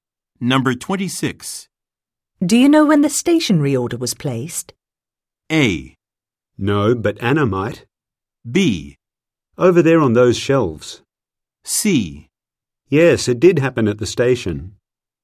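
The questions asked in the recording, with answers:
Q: Do you know when the stationery order was placed?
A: A: No, but Anna might.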